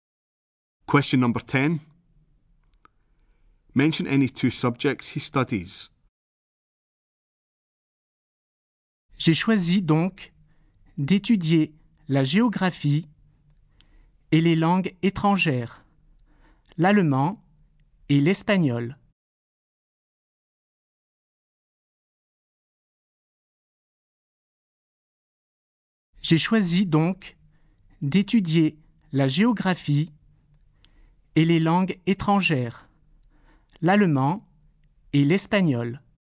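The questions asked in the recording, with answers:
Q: Mention any two subjects he studies.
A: Any two of geography, German, Spanish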